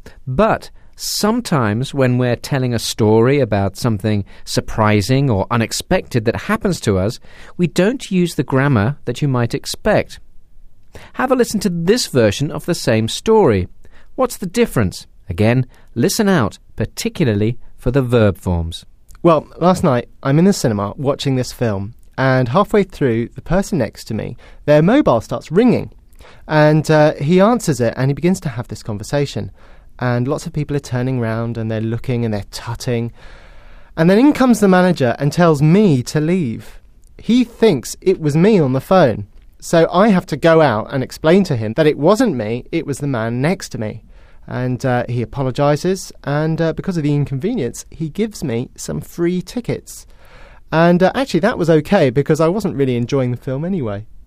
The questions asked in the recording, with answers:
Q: What's the difference?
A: Instead of using past forms, he uses present forms.